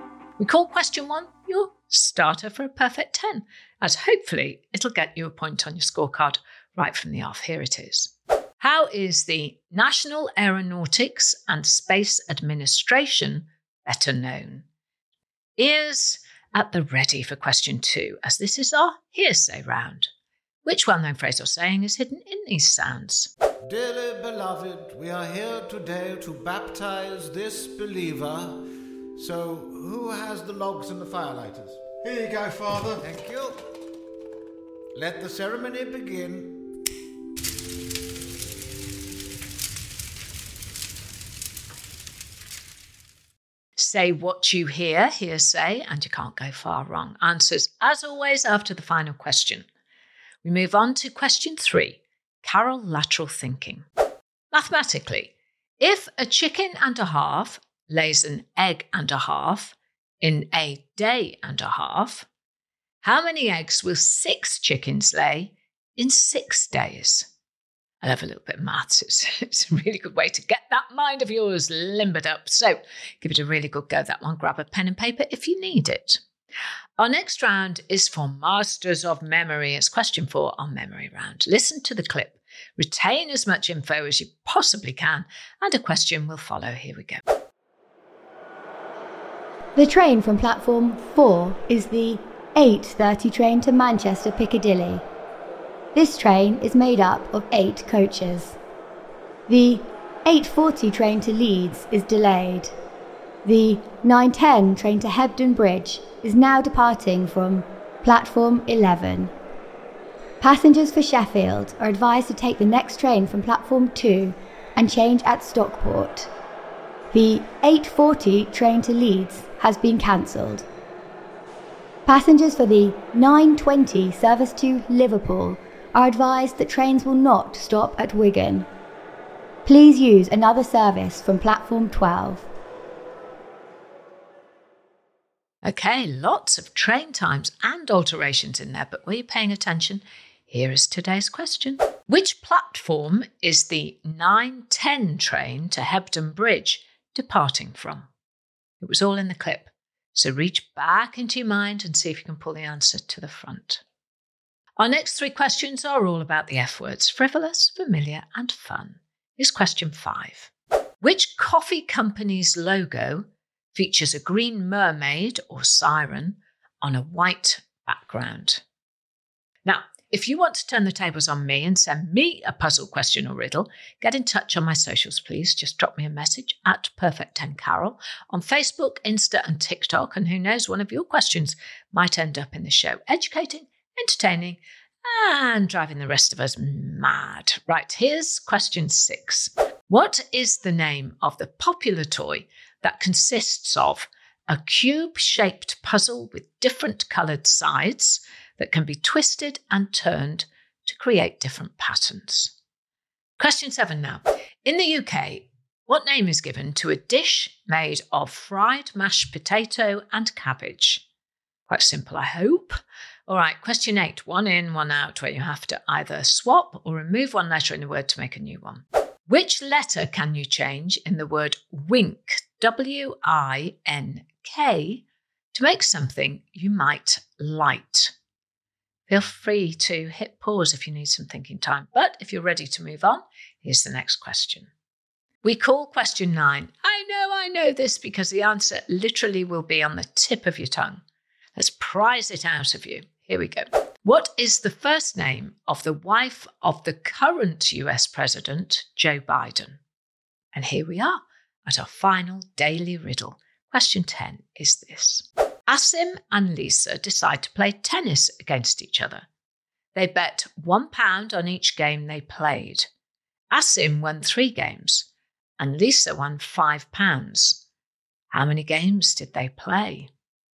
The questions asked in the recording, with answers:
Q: Which well known phrase or saying is hidden in these sounds?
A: And the answer is baptism of fire

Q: Mathematically, if a chicken and a half lays an egg and a half in a day and a half, how many eggs will six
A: And the answer is 24 eggs.

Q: Which platform is the 910 train to Hebden Bridge departing from?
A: the answer was platform 11

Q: Which letter can you change in the word wink, W I N K, to make something you might light?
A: Well, if you change the letter N for a letter C, you get the word wick, like a candle wick.

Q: How many games did they play?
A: And the answer, of course, is 11 games.